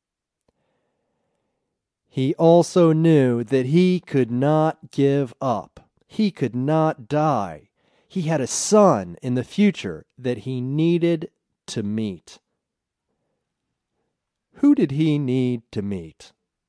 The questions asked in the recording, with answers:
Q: Who did he need to meet?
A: He had a son in the future that he needed to meet.